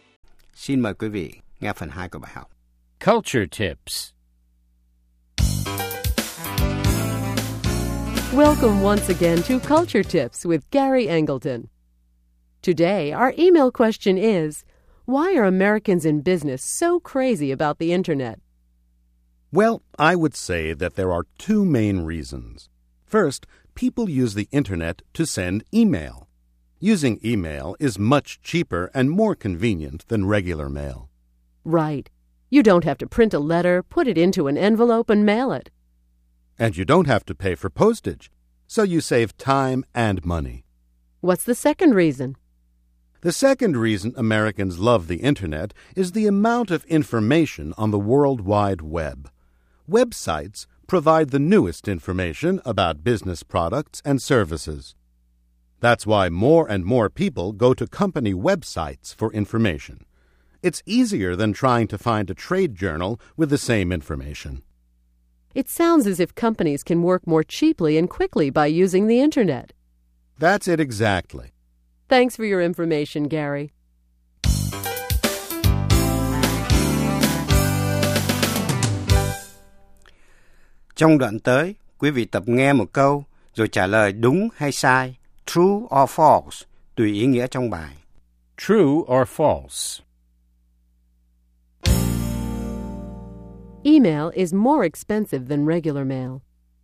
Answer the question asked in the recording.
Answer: False. With email, you save a lot of money on paper, envelopes, and postage.